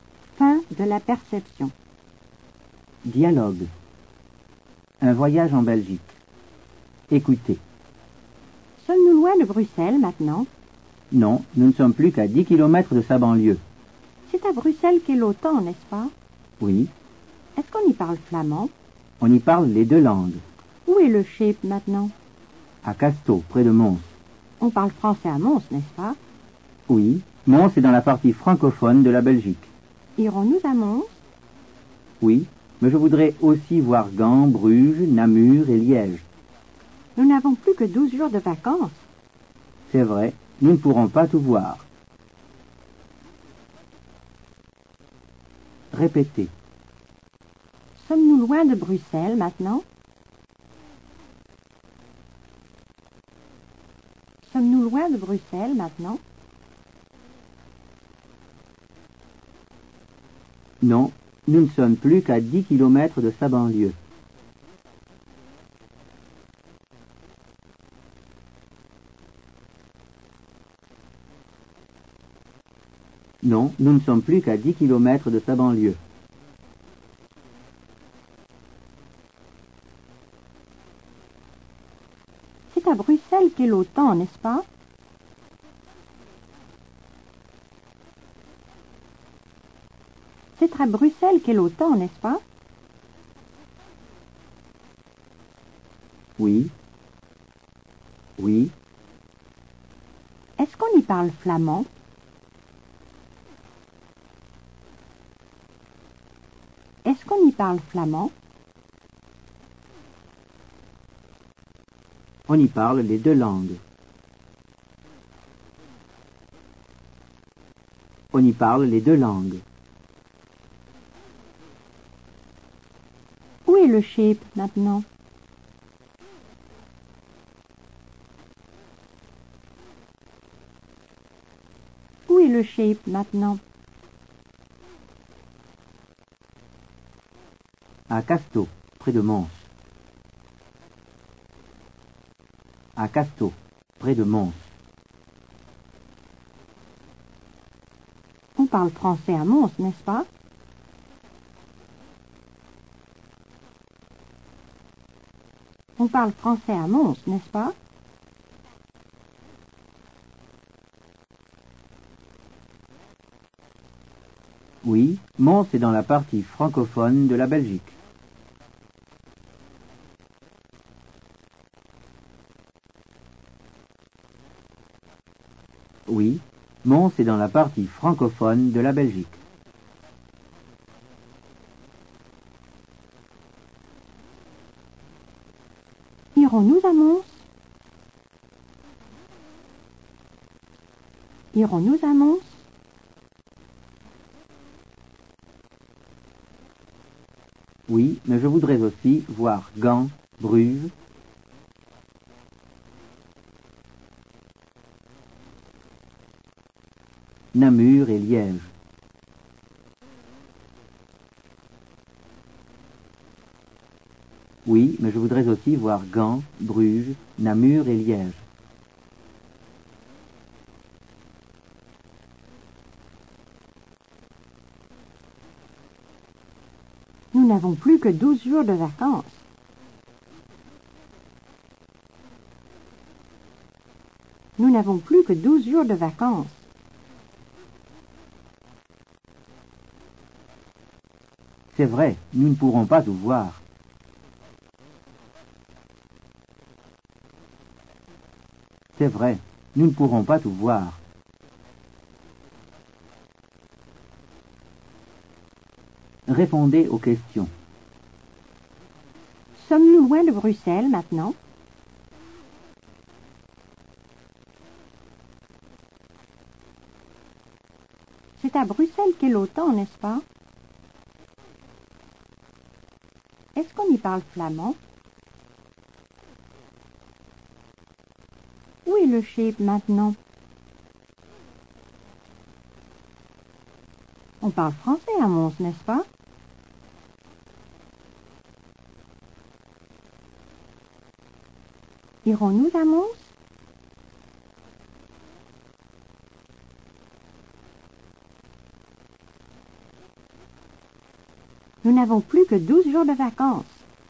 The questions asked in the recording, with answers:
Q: Sommes-nous loin de Bruxelles maintenant?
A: Non, nous ne sommes plus qu'à 10 km de sa banlieue.

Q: C'est à Bruxelles qu'est l'OTAN, n'est-ce pas?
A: Oui.

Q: Est-ce qu'on y parle flamand?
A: On y parle les deux langues.

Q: Où est le schip maintenant?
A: À Casto, près de Mons.

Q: On parle français à Mons, n'est-ce pas?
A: Oui, Mons est dans la partie francophone de la Belgique.

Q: Irons-nous à Mons?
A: Oui, mais je voudrais aussi voir Gand, Bruges, Namur et Liège.